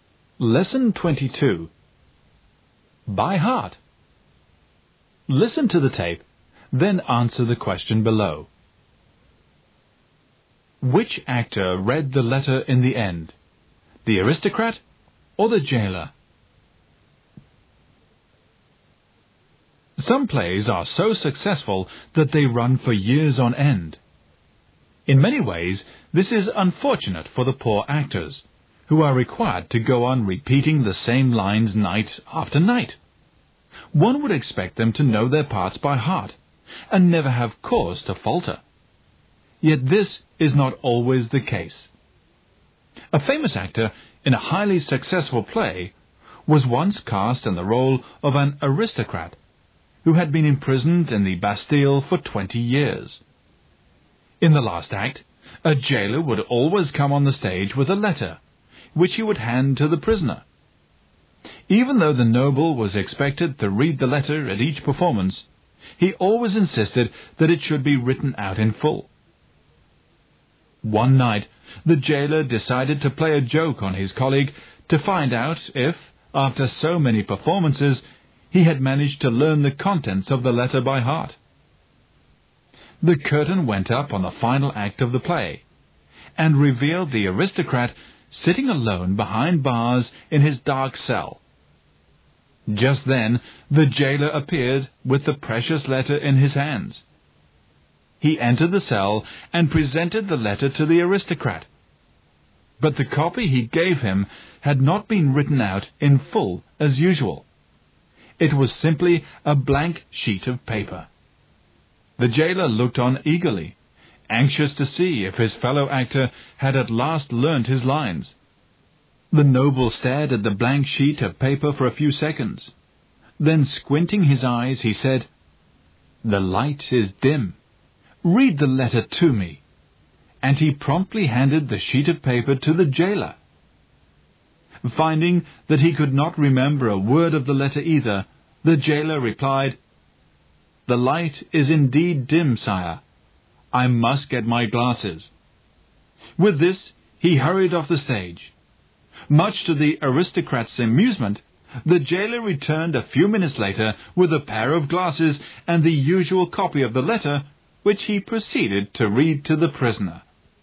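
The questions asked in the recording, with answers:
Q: Which actor read the letter in the end?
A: The jailer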